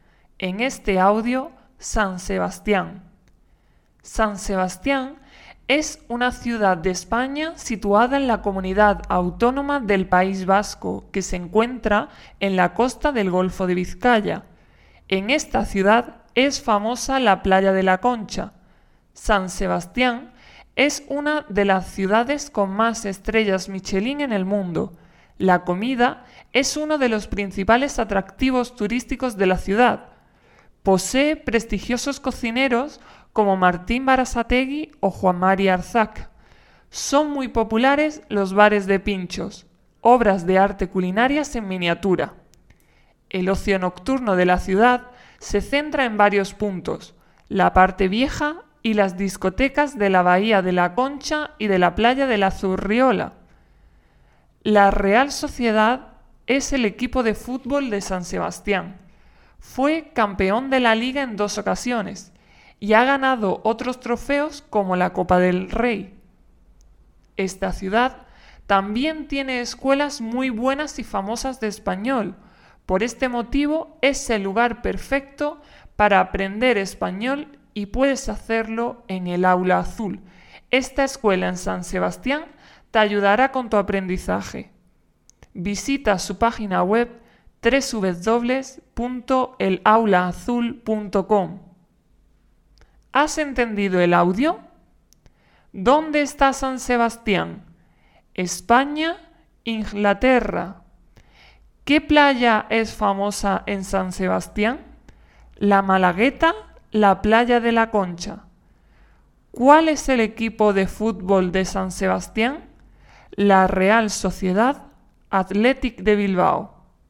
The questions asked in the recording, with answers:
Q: ¿Dónde está San Sebastián?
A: España

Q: ¿Qué playa es famosa en San Sebastián?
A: Playa de la Concha

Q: ¿Cuál es el equipo de fútbol de San Sebastián?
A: la Real Sociedad